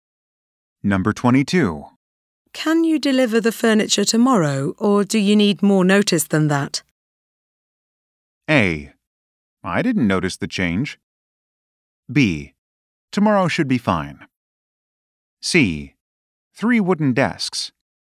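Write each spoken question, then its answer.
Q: Can you deliver the furniture tomorrow, or do you need more notice than that?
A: B: Tomorrow should be fine.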